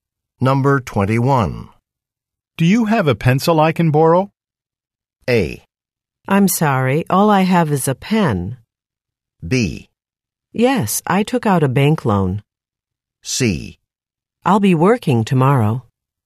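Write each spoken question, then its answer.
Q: Do you have a pencil I can borrow?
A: A: I'm sorry, all I have is a pen.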